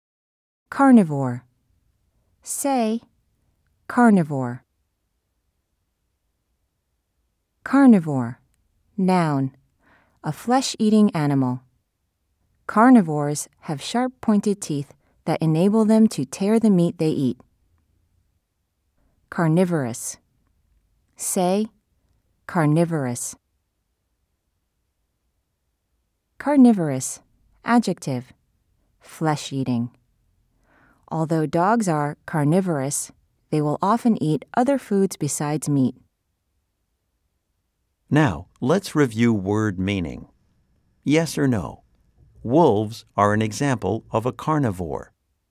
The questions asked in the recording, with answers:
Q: Yes or no? Wolves are an example of a carnivore.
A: If you said yes, you are right.